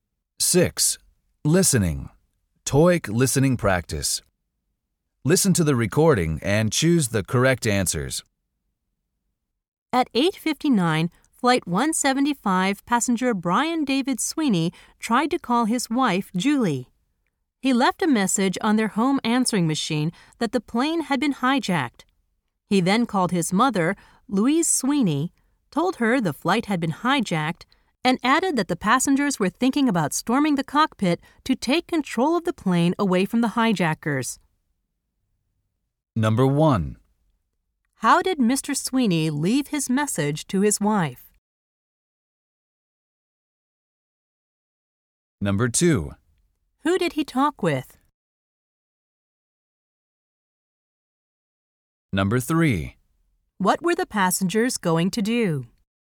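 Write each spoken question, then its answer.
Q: How did Mr. Sweeney leave his message to his wife?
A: On their home answering machine

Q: Who did he talk with?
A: His mother, Louise Sweeney

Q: What were the passengers going to do?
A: Storm the cockpit to take control of the plane from the hijackers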